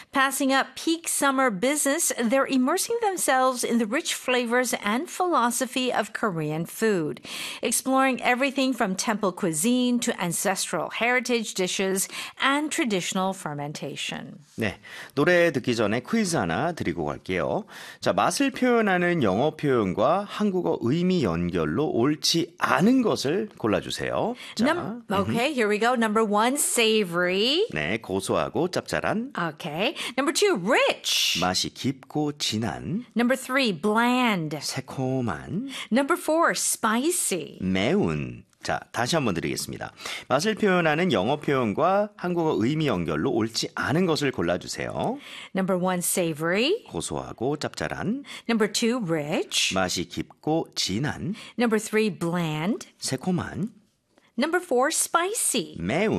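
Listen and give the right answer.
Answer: 3: bland - 새콤한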